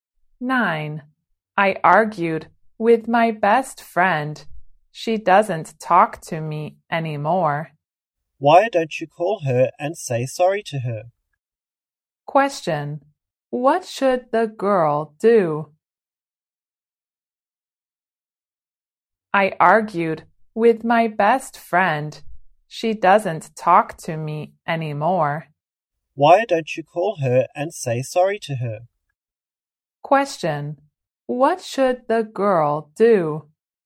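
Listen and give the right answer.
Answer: Call her best friend and say sorry.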